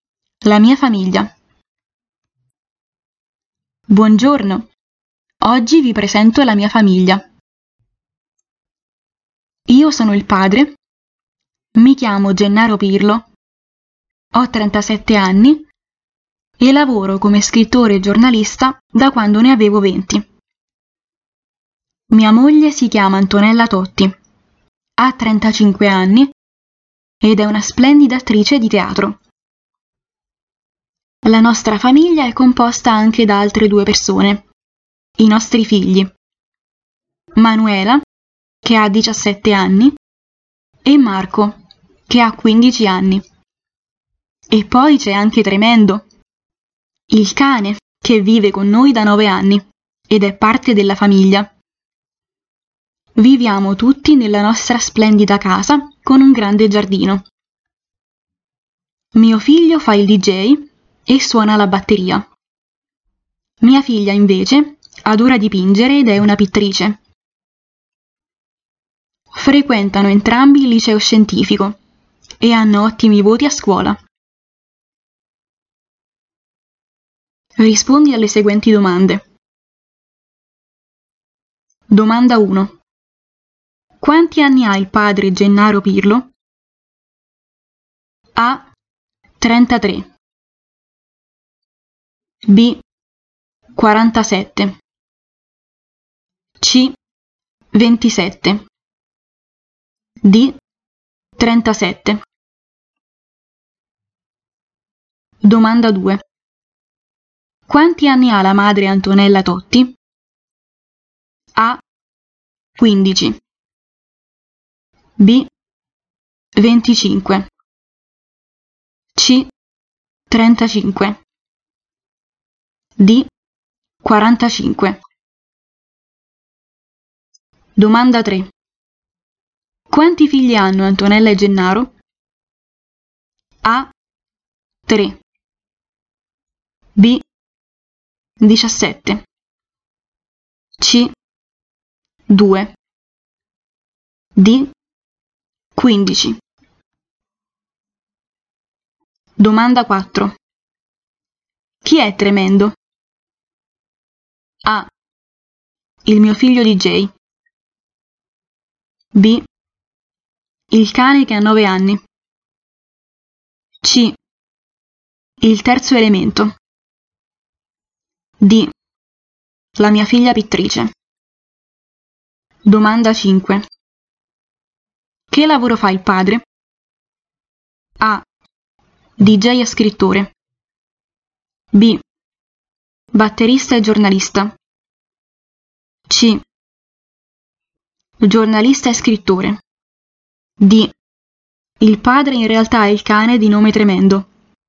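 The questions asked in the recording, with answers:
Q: Quanti anni ha il padre Gennaro Pirlo?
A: D: 37

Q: Quanti anni ha la madre Antonella Totti?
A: C: 35

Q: Quanti figli hanno Antonella e Gennaro?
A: C: 2

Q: Chi è Tremendo?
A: B: Il cane che ha 9 anni.

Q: Che lavoro fa il padre?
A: C: Giornalista e scrittore.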